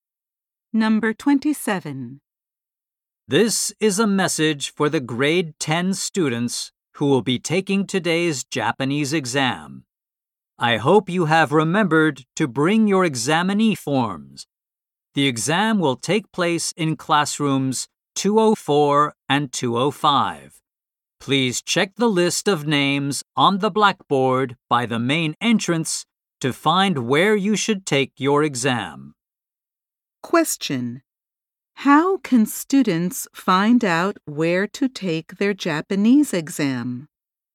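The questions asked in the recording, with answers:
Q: How can students find out where to take their Japanese exam?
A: By checking the list of names on the blackboard by the main entrance.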